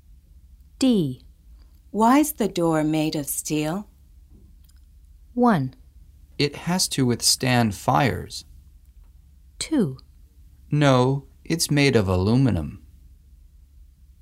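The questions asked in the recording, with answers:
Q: Why's the door made of steel?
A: 1: It has to withstand fires.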